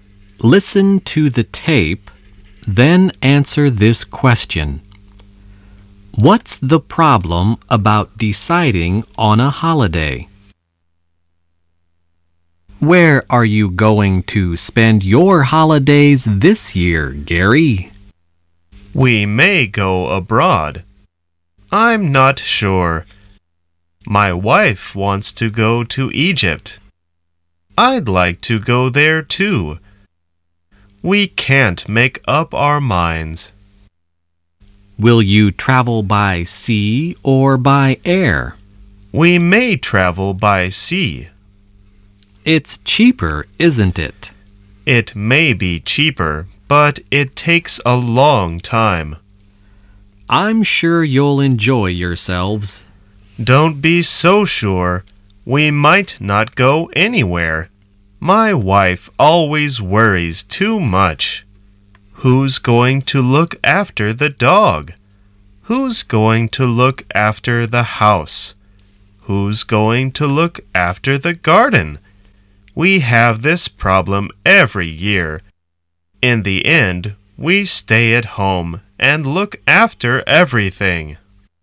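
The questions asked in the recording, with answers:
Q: What's the problem about deciding on a holiday?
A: Gary's wife worries about who will look after the dog, house and garden, so they can't decide and end up staying at home.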